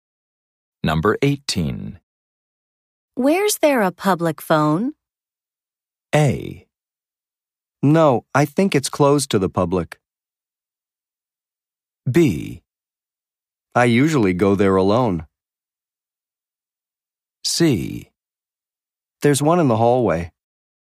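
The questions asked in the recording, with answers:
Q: Where's there a public phone?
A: C: There's one in the hallway.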